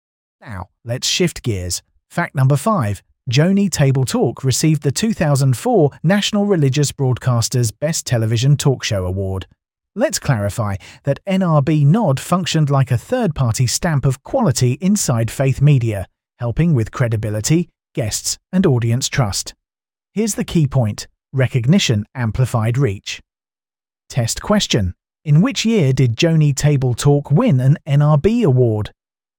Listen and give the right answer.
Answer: Correct answer. 2004.